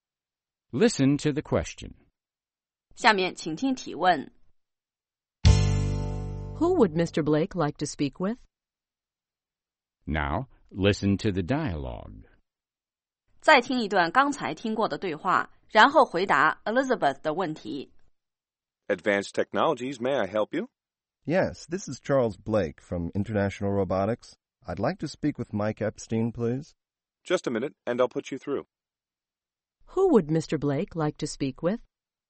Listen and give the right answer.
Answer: He'd like to speak with Mr. Epstein.